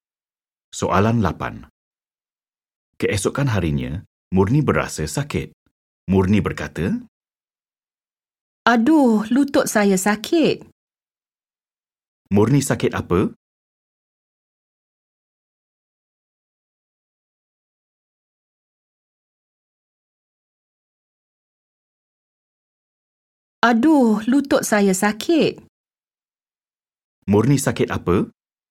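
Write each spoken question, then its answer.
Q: Murni sakit apa?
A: sakit lutut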